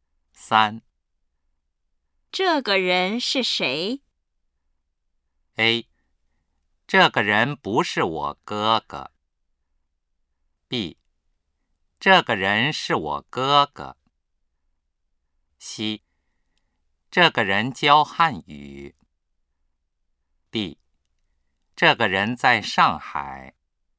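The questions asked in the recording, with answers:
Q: 这个人是谁?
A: B: 这个人是我哥哥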